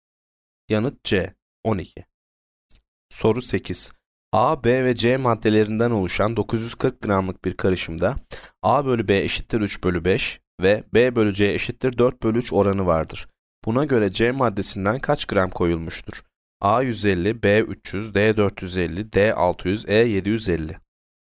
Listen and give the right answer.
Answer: Yanıt B 300.